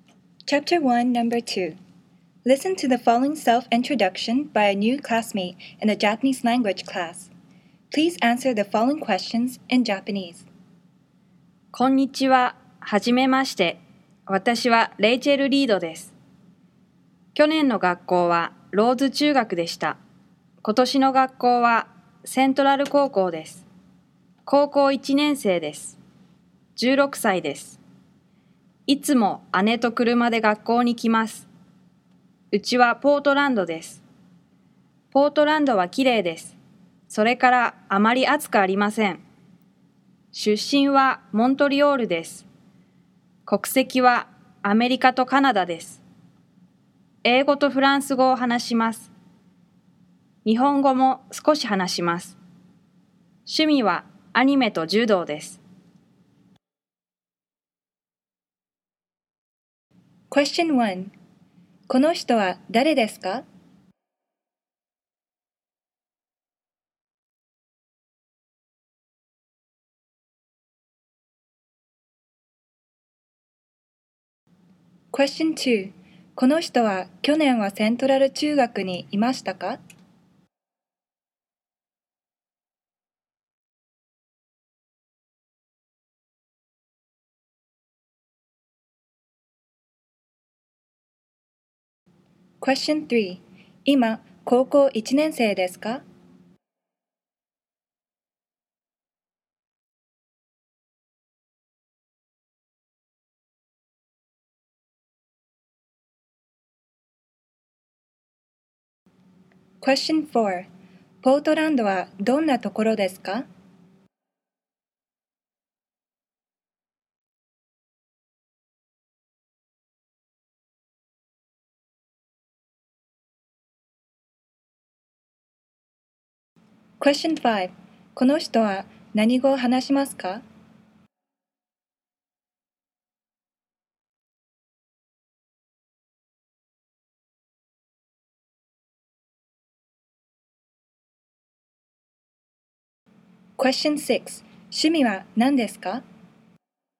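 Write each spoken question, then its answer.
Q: この人は誰ですか?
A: レイチェル・リードです。

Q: この人は去年はセントラル中学にいましたか?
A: いいえ、ローズ中学にいました。

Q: 今、高校1年生ですか?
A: はい、高校1年生です。

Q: ポートランドはどんなところですか?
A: きれいで、あまり暑くありません。

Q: この人は何語を話しますか?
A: 英語とフランス語と、日本語を少し話します。

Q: 趣味は何ですか?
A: アニメと柔道です。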